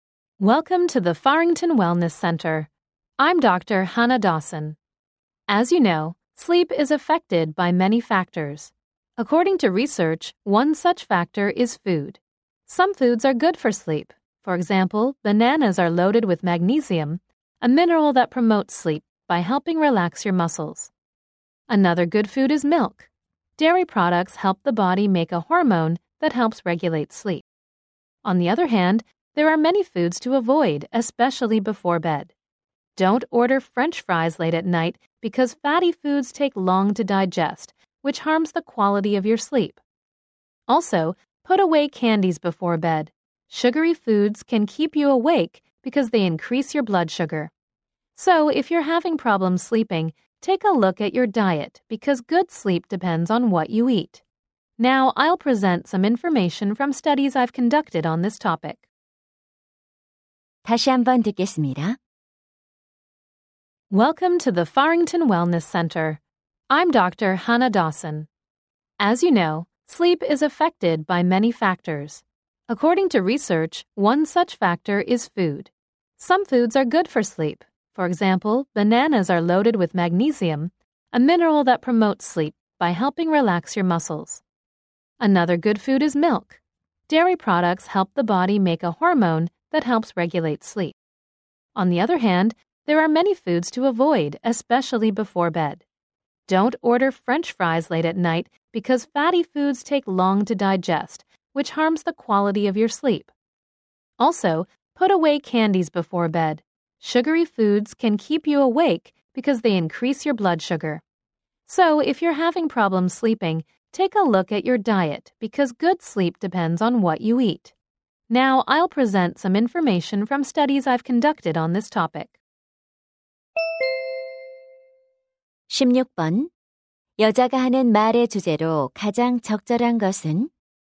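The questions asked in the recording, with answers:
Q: 여자가 하는 말의 주제로 가장 적절한 것은?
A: 수면에 영향을 미치는 음식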